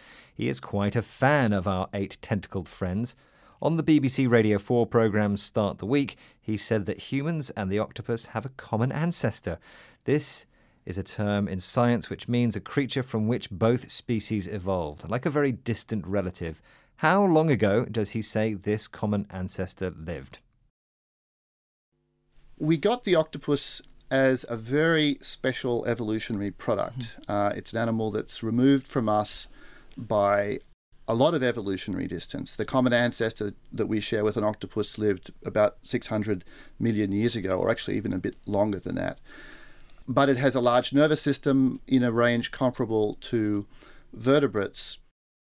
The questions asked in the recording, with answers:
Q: How long ago does he say this common ancestor lived?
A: So our common ancestor lived about 600 million years ago, or maybe a little bit longer than that.